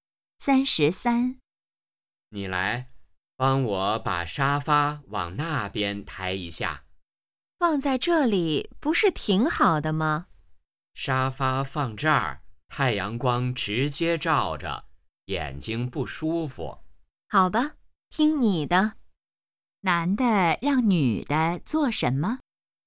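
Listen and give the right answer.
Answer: 帮他抬沙发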